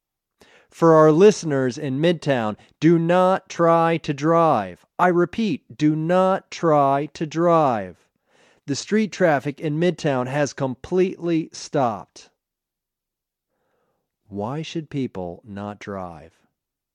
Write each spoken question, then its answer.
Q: Why should people not drive?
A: People shouldn't drive because the street traffic in Midtown has completely stopped.